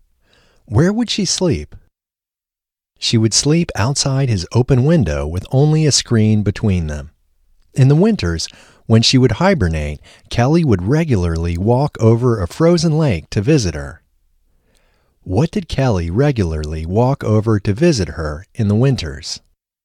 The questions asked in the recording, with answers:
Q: What did Kelly regularly walk over to visit her in the winters?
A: Kelly would regularly walk over a frozen lake to visit her in the winters.